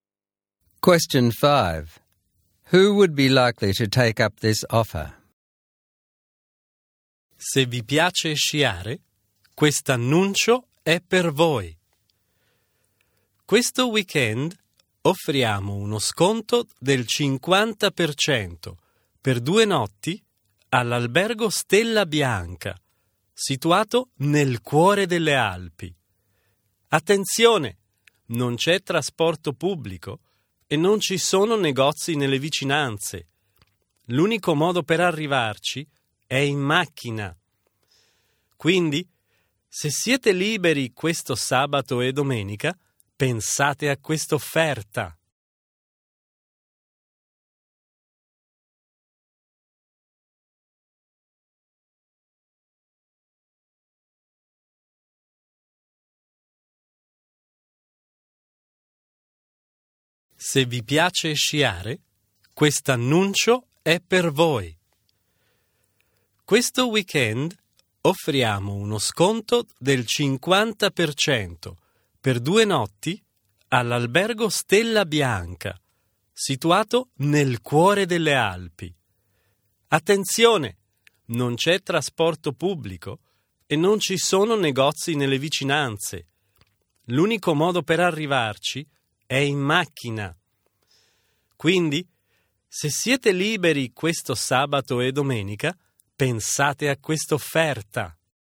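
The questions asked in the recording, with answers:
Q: Who would be likely to take up this offer?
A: People who like skiing, have a car and are free this weekend (Saturday and Sunday).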